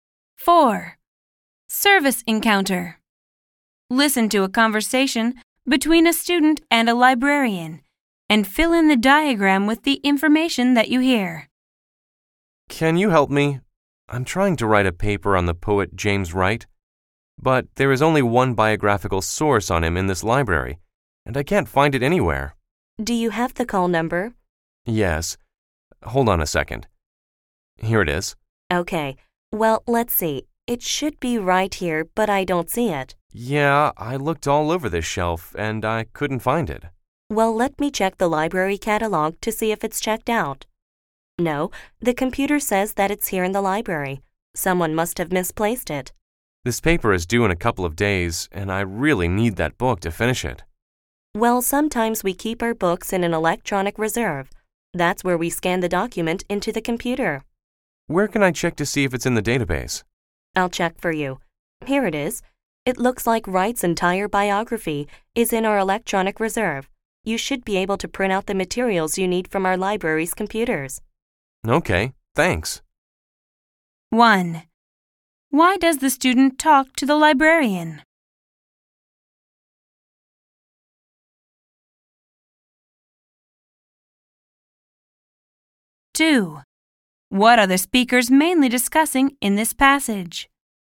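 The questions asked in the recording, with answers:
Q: Why does the student talk to the librarian?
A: She can't find the only biographical source on James Wright that she needs for her paper

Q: What are the speakers mainly discussing in this passage?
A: Finding a missing book about James Wright, which turns out to be in the library's electronic reserve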